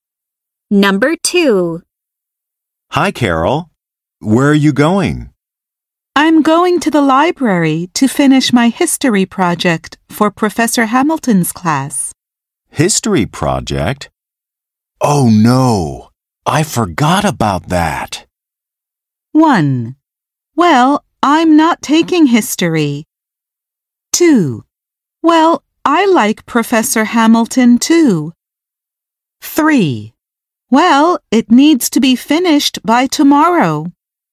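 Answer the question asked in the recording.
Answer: 3: Well, it needs to be finished by tomorrow.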